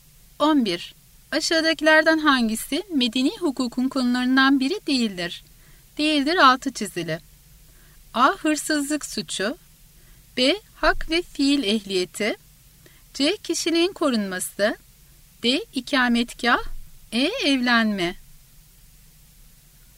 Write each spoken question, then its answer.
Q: Aşağıdakilerden hangisi medeni hukukun konularından biri değildir?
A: Doğru yanıt A. Hırsızlık suçu.